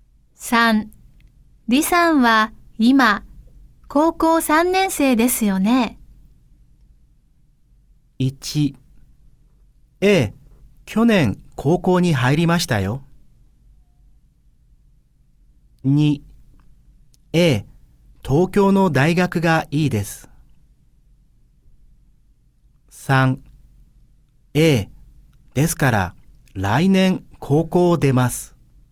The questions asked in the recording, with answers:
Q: 李さんは今高校3年生ですよね。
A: 哦,所以三是对的,二就错嘛。